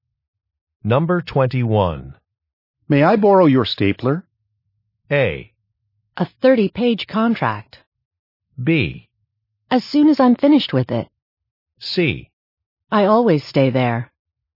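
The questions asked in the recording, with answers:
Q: May I borrow your stapler?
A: B: As soon as I'm finished with it.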